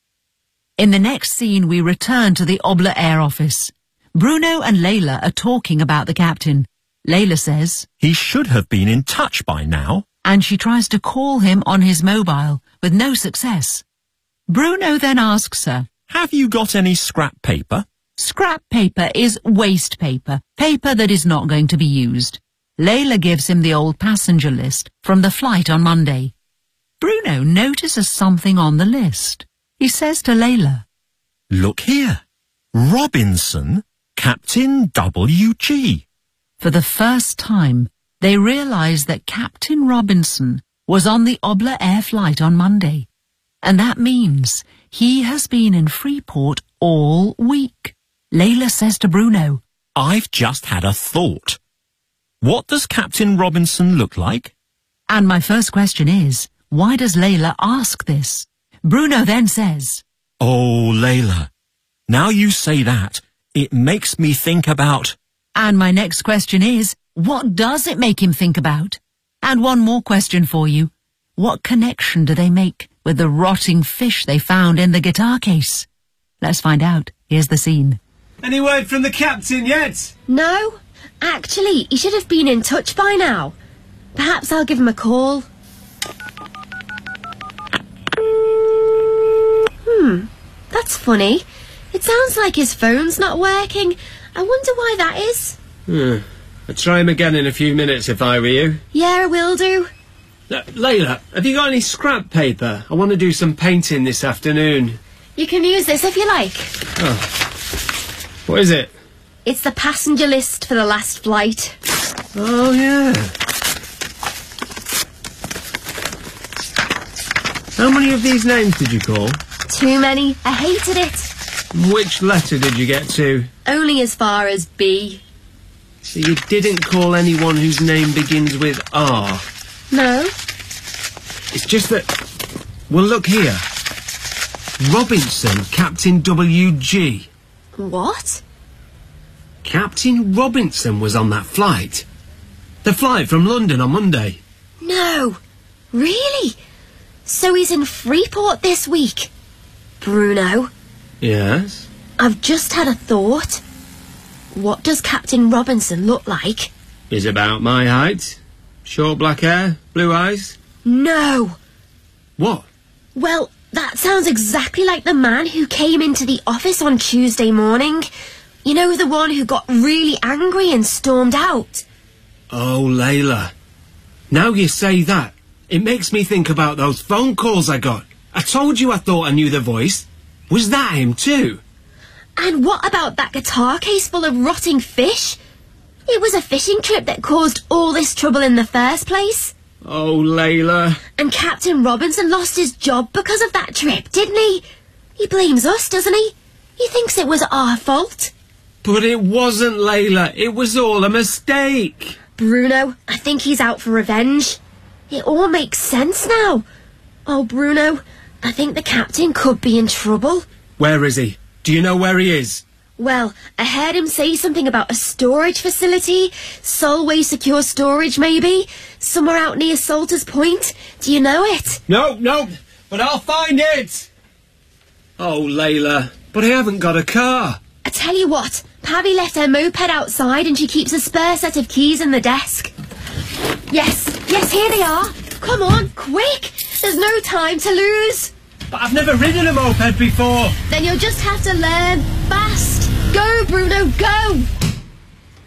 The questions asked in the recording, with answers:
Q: And my first question is, why does Layla ask this?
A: Because she realises that it was Captain Robinson who came into the office earlier in the week.

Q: And my next question is, what does it make him think about?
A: "It makes me think about those phone calls I got.

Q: What connection do they make with the rotting fish they found in the guitar case?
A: So the rotting fish must have been a message from Captain Robinson.